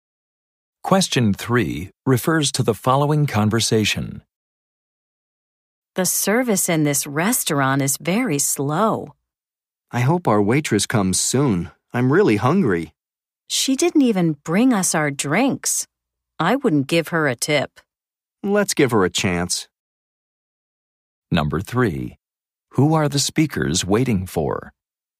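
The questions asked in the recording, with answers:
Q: Who are the speakers waiting for?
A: Their waitress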